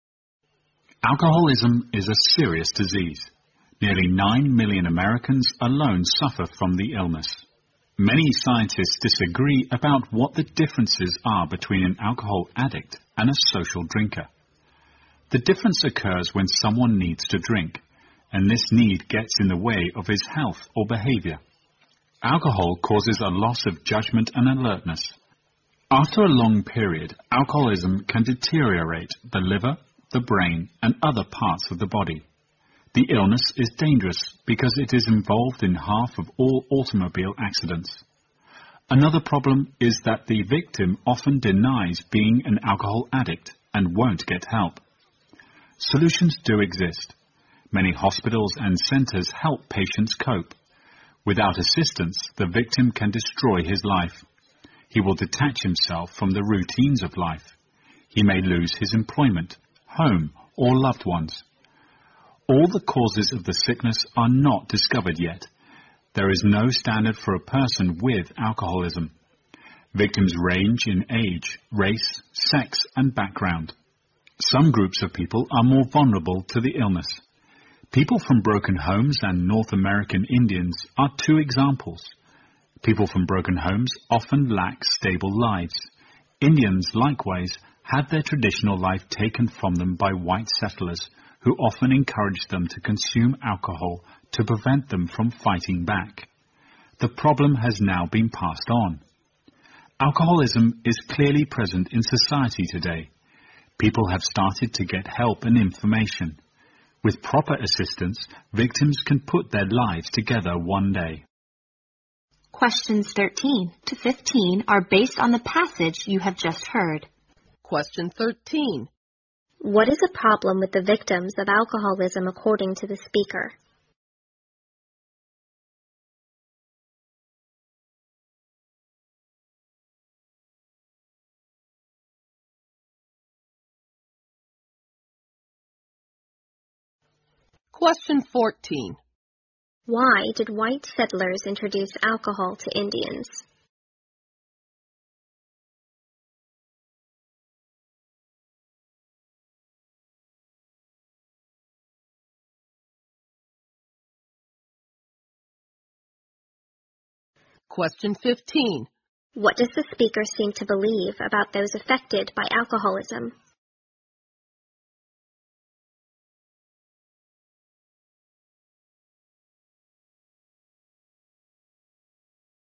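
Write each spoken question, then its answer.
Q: What is a problem with the victims of alcoholism according to the speaker?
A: They often deny being addicts and won't get help

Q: Why did white settlers introduce alcohol to Indians?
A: To stop them from fighting back

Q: What does the speaker seem to believe about those affected by alcoholism?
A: With proper help they can rebuild their lives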